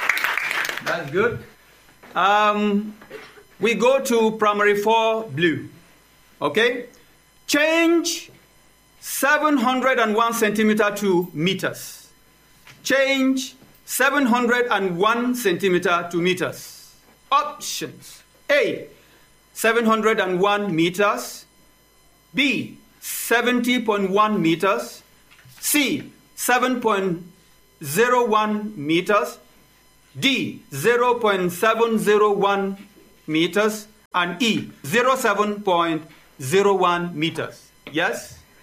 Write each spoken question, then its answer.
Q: Change 701 centimeter to meters.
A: C, yes. 7.01.